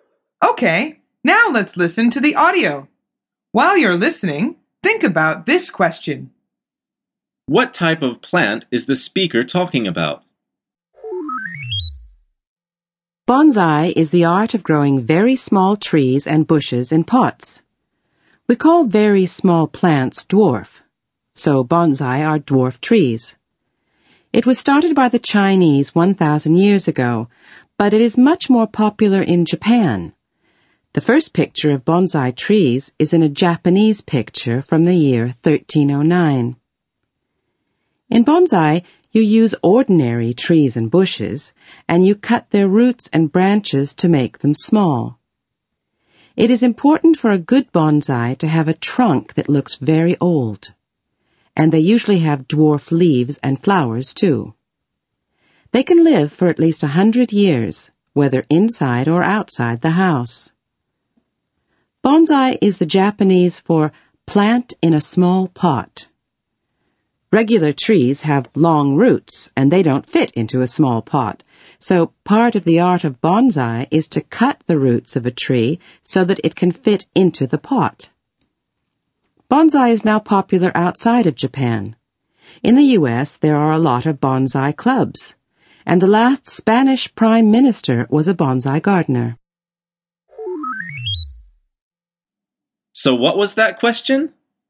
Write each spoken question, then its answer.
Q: What type of plant is the speaker talking about?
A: she is talking about bonsai trees.